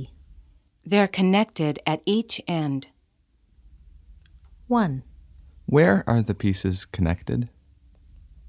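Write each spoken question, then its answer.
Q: Where are the pieces connected?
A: At each end.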